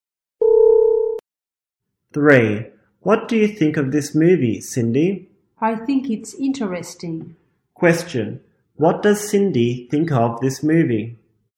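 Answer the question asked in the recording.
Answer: She thinks it's interesting.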